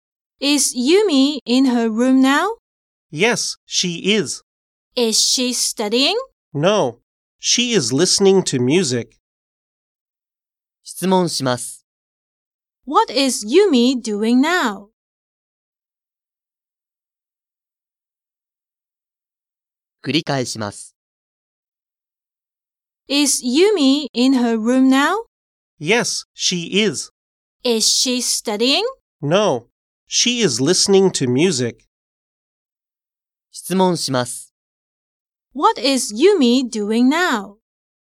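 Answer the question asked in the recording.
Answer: She is listening to music.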